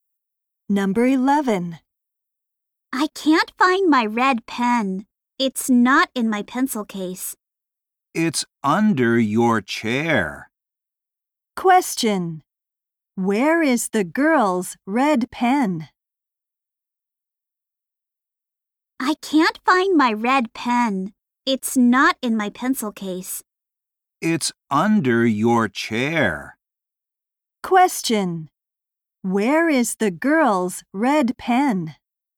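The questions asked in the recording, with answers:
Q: Where is the girl's red pen?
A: Under her chair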